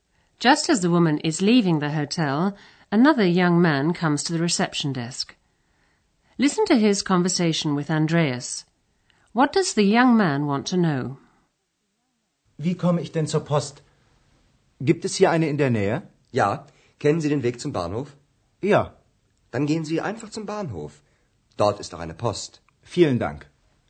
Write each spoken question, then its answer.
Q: What does the young man want to know?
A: The young man wants to know if there's a post office near the hotel.